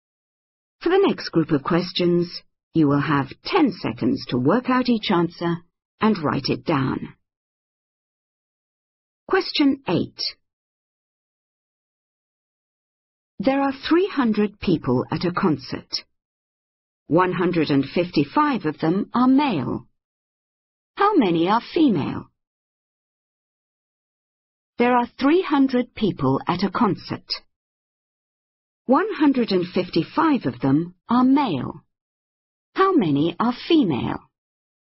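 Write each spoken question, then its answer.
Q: 155 of them are male. How many are female?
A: 145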